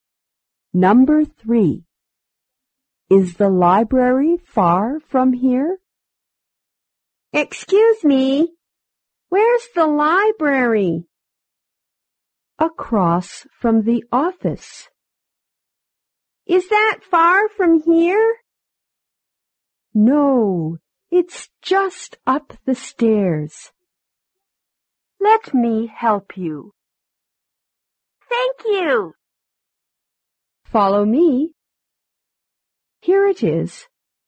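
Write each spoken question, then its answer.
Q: Is the library far from here?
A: No, it's just up the stairs.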